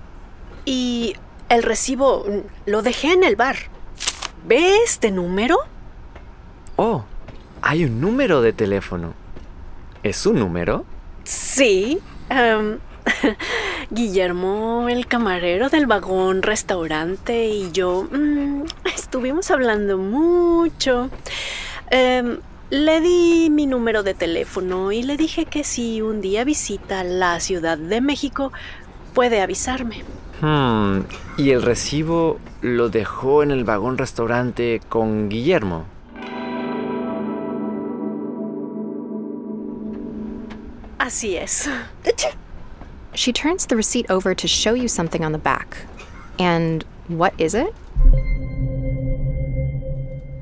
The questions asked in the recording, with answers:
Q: And what is it?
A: Right. Un número de teléfono.